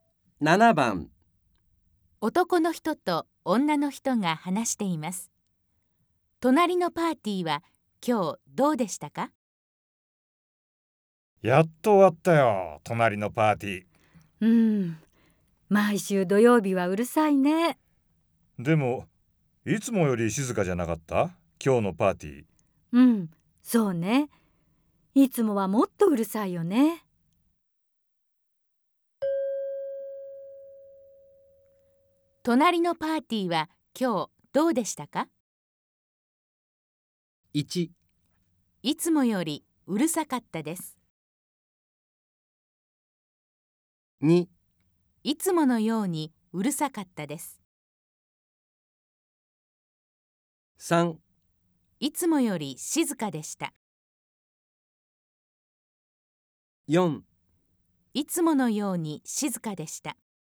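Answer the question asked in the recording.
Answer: 3: いつもより静かでした。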